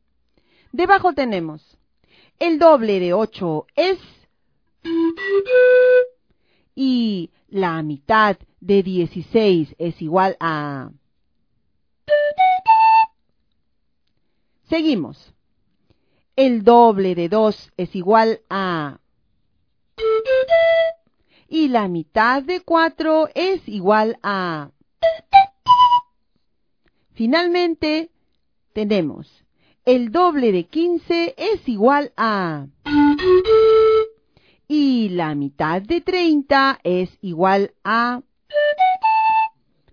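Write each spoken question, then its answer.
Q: el doble de 8 es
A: 16

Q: el doble de 15 es igual a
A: 30

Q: la mitad de 30 es igual a.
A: 15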